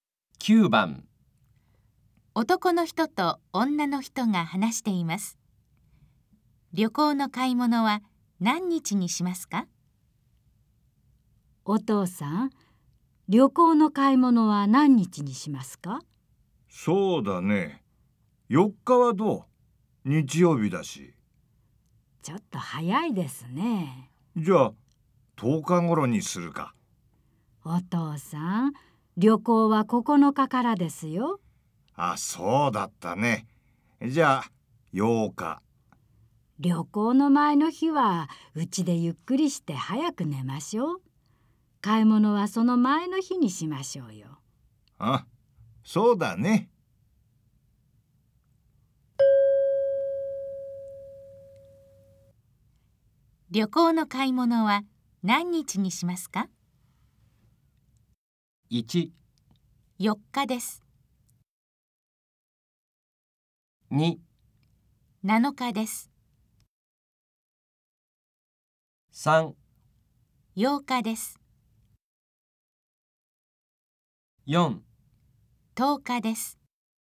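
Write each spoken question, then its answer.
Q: 旅行の買い物は何日にしますか?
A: 2: 7日です。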